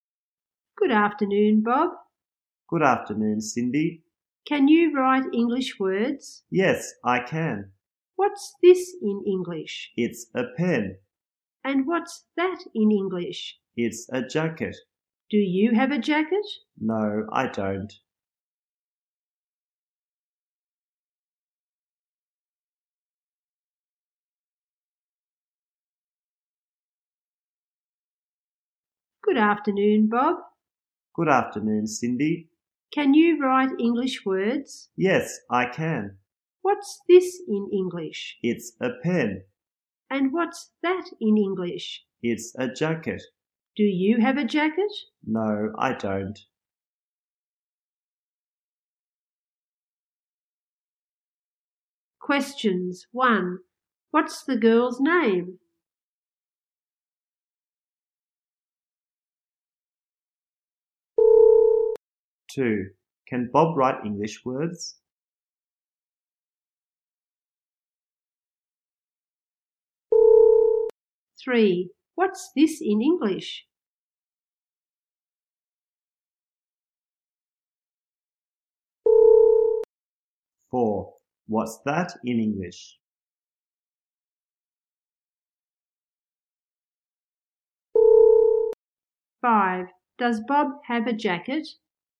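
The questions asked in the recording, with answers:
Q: What's the girl's name?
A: Cindy

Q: Can Bob write English words?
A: Yes, he can.

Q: What's this in English?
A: A pen

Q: What's that in English?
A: A jacket

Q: Does Bob have a jacket?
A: No, he doesn't.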